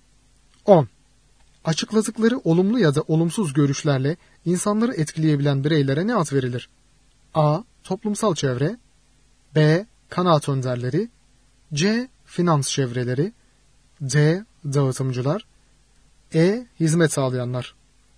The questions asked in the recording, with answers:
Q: Açıkladıkları olumlu ya da olumsuz görüşlerle insanları etkileyebilen bireylere ne ad verilir?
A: Doğru yanıt B şıkkı. Kanaat önderleri.